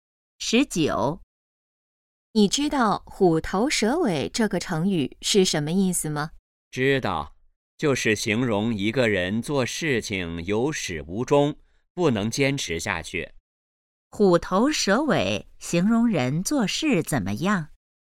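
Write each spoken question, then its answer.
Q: 虎头蛇尾形容人做事怎么样?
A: 有始无终,不能坚持下去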